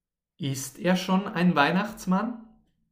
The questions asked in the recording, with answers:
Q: Ist er schon ein Weihnachtsmann?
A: Nein, er ist noch kein Weihnachtsmann, aber er will Weihnachtsmann werden.